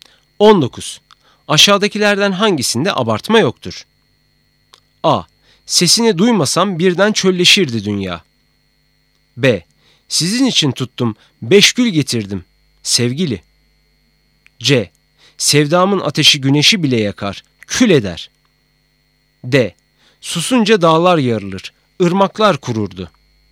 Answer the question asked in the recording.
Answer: Doğru cevap B.